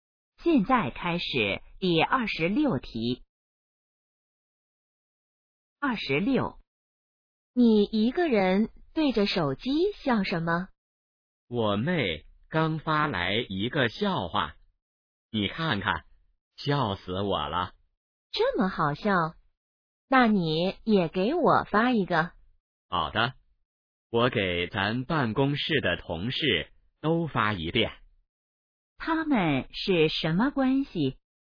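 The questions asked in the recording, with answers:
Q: 他们是什么关系?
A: 同事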